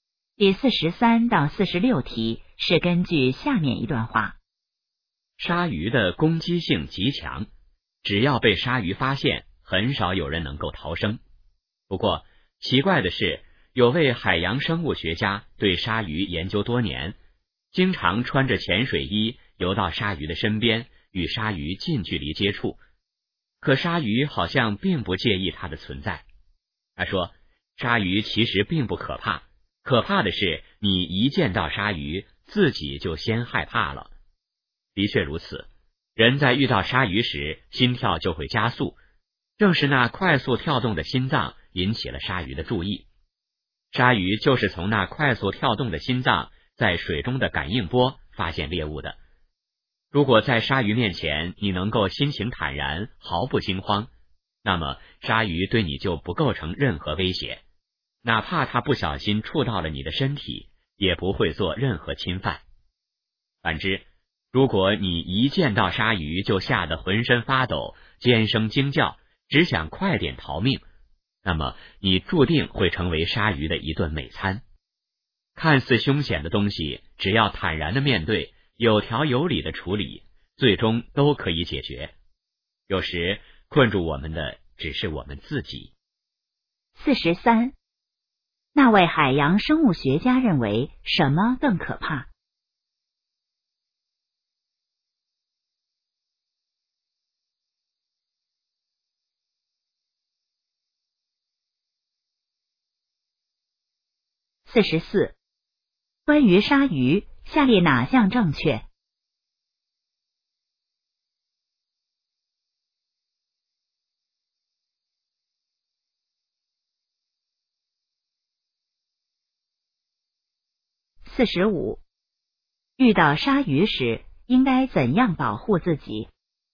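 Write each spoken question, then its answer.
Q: 那位海洋生物学家认为什么更可怕?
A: 见到鲨鱼自己先害怕

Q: 遇到鲨鱼时应该怎样保护自己?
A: 心情坦然,毫不惊慌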